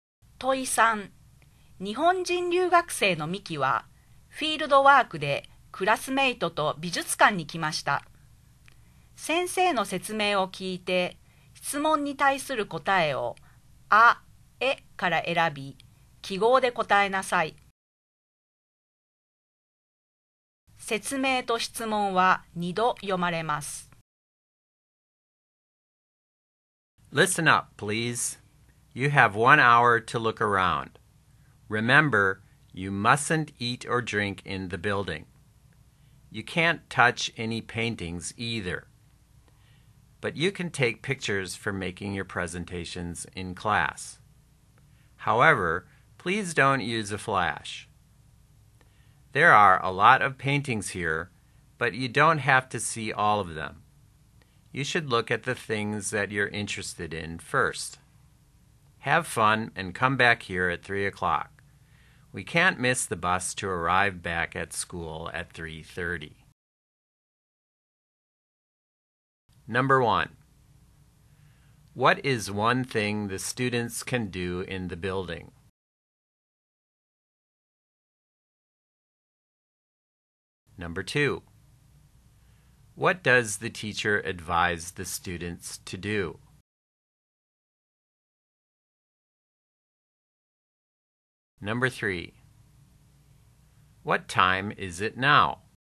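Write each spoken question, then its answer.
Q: What is one thing the students can do in the building?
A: Take pictures (without a flash)

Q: What does the teacher advise the students to do?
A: Look at the things they're interested in first

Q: What time is it now?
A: 2 o'clock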